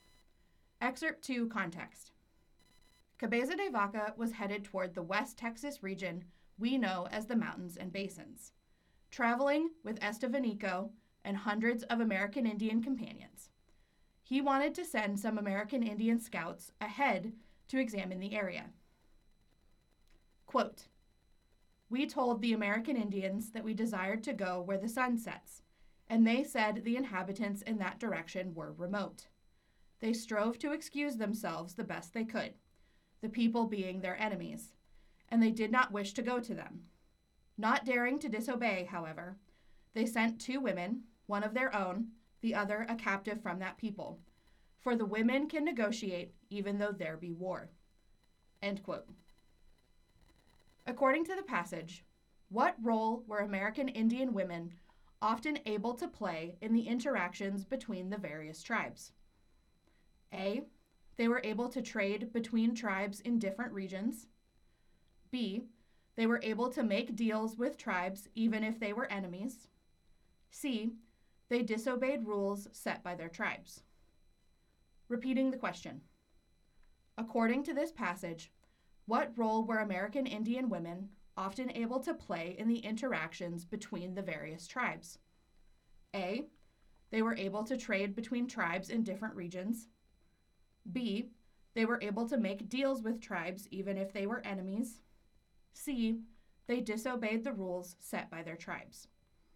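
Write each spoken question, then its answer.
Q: According to the passage, what role were American Indian women often able to play in the interactions between the various tribes?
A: B: They were able to make deals with tribes even if they were enemies.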